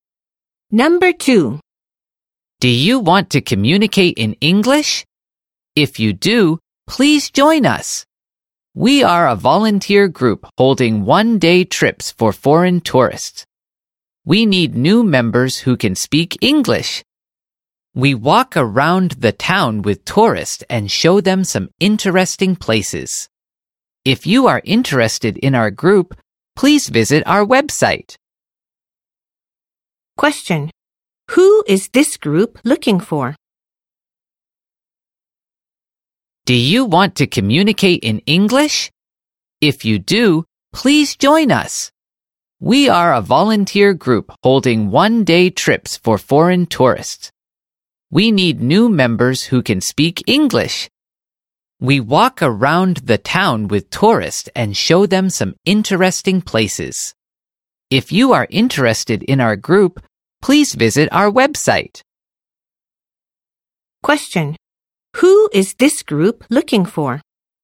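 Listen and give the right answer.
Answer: New members who can speak English.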